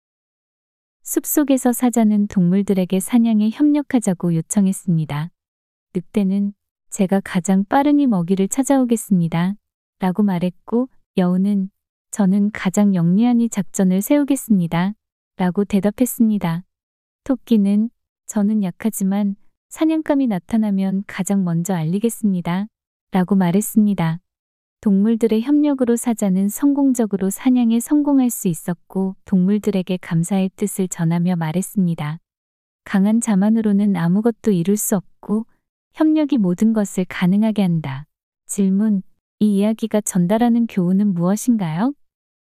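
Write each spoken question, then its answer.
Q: 이 이야기가 전달하는 교훈은 무엇인가요?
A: 강한 힘만으로는 아무것도 이룰 수 없고, 협력하면 모든 것이 가능하다.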